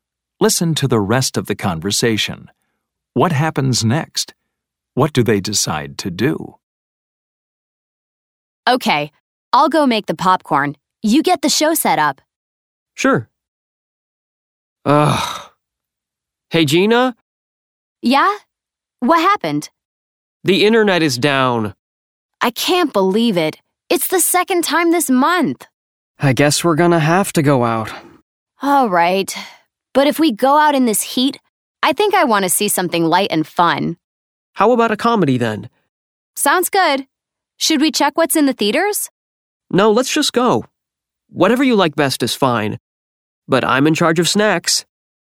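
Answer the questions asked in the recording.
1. The internet goes down.
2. Go out to see a comedy at the theater.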